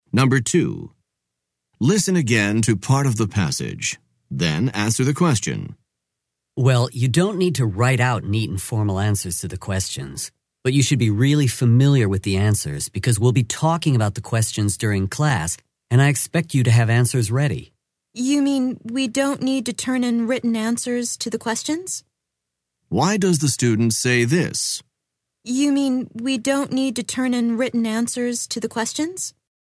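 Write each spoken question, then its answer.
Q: Why does the student say this?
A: To check that he understood: written answers don't have to be handed in.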